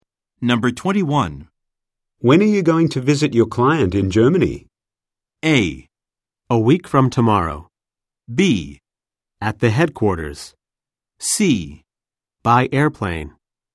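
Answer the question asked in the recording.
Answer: A: A week from tomorrow.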